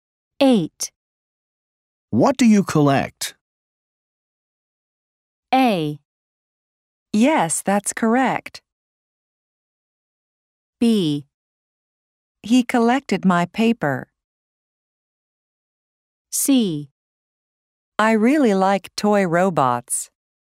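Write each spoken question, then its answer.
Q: What do you collect?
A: C: I really like toy robots.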